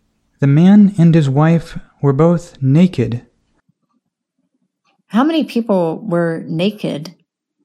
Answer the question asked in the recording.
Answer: Two. The man and his wife were both naked.